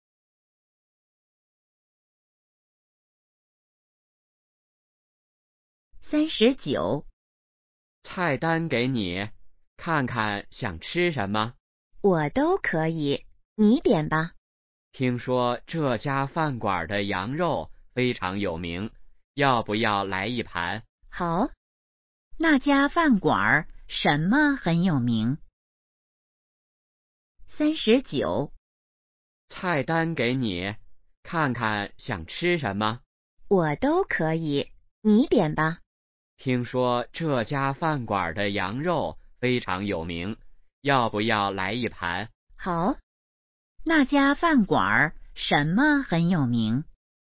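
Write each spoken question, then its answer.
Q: 那家饭馆什么很有名?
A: 羊肉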